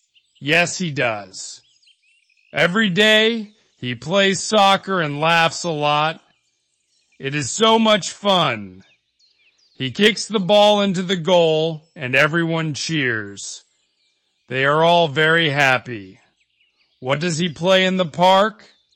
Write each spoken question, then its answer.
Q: What does he play in the park?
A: Soccer. He plays soccer.